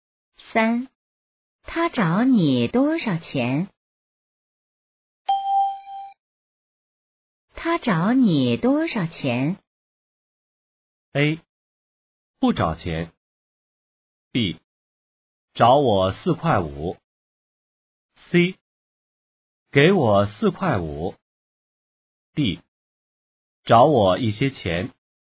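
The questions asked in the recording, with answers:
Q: 他找你多少钱?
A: B: 找我四块五。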